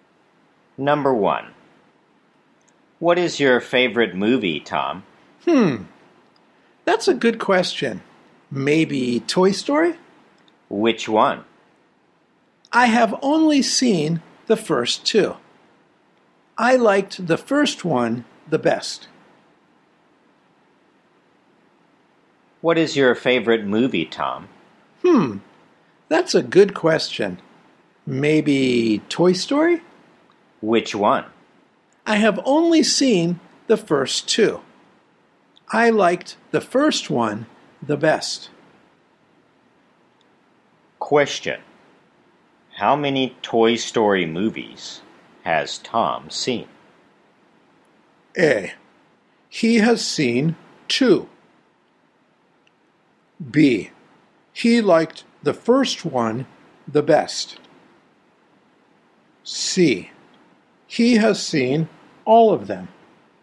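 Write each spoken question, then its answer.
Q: How many Toy Story movies has Tom seen?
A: A: He has seen two.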